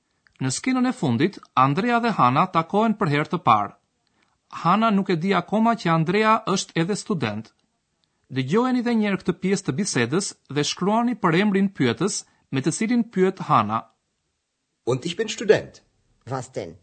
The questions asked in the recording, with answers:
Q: Dëgjojeni edhe njerë këtë pjesë të bisedës dhe shkruani për emrin pyetës me të cilin pyet Hana.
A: Përgjigja është për emri pyetës shfarë, në gjermanisht was.